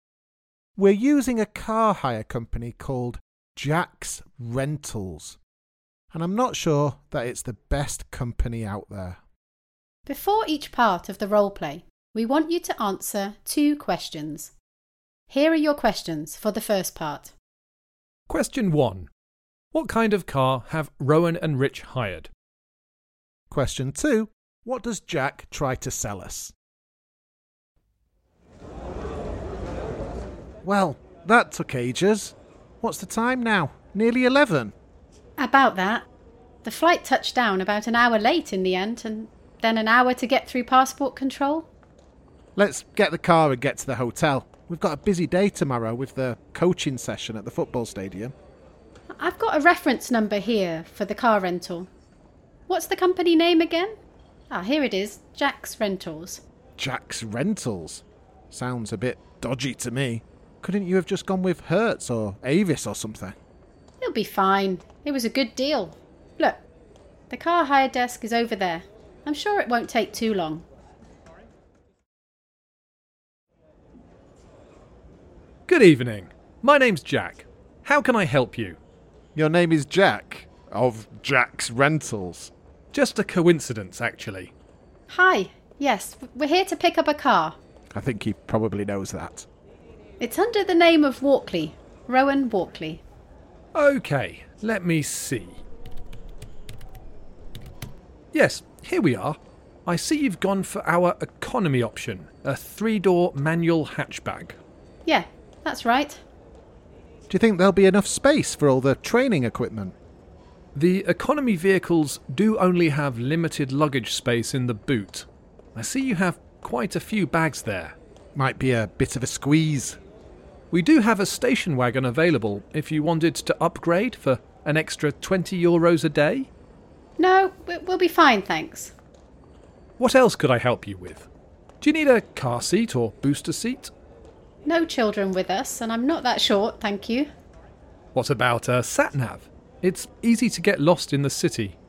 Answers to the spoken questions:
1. The answer is a 3-door manual hatchback.
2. First of all, I try to rent them a bigger car, and then I try to rent them a child seat or booster seat, and then a sat-nav.